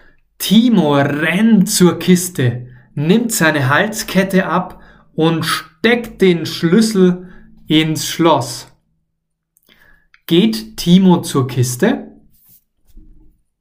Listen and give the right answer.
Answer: Nein, er geht nicht zur Kiste.